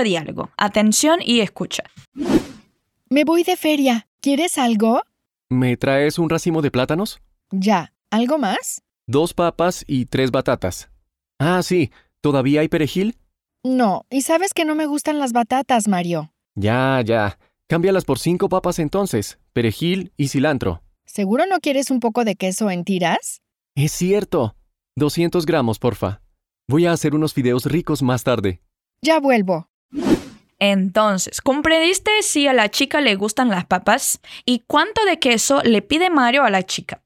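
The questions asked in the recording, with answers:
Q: ¿Y cuánto de queso le pide Mario a la chica?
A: 200 gramos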